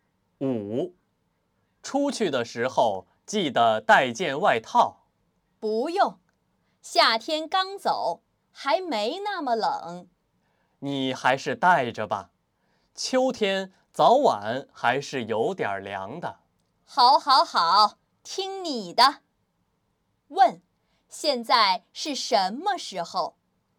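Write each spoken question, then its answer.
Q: 现在是什么时候?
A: 秋天(夏天刚过)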